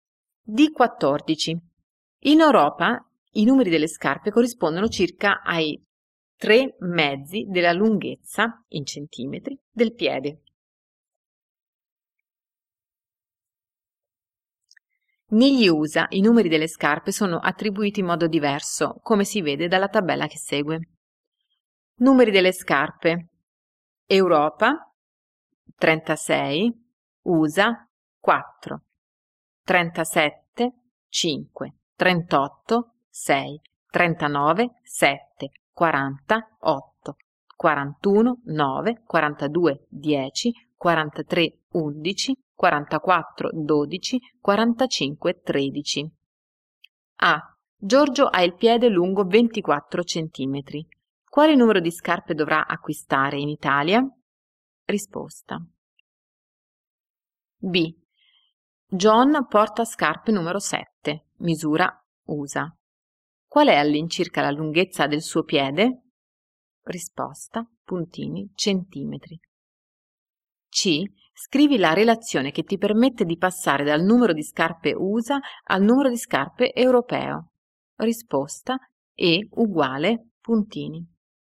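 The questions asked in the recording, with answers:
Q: Quale numero di scarpe dovrà acquistare in Italia?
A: 36

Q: Qual è all'incirca la lunghezza del suo piede?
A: 26 cm

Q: Scrivi la relazione che ti permette di passare dal numero di scarpe USA al numero di scarpe europeo.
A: E = USA + 32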